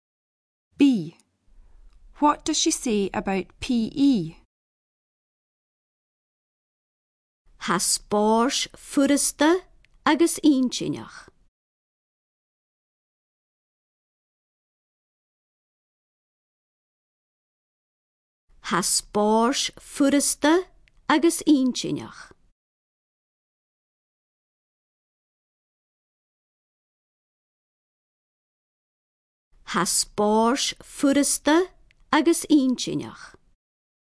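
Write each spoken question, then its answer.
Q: What does she say about PE?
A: It is easy and interesting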